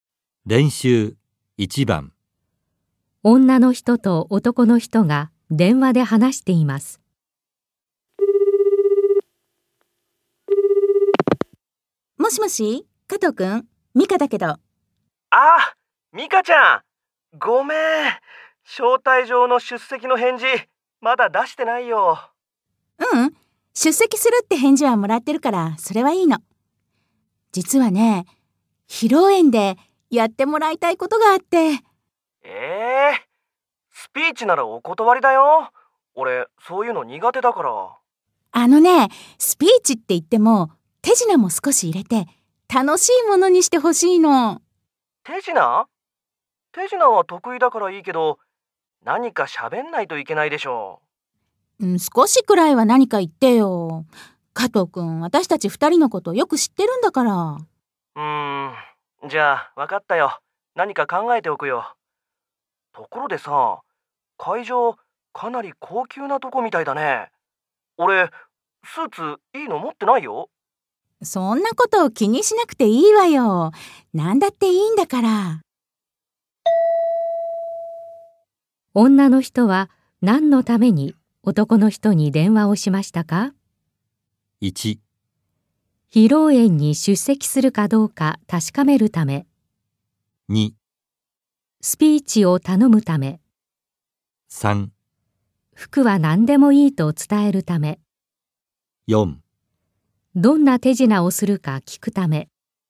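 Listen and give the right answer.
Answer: 2: スピーチを頼むため。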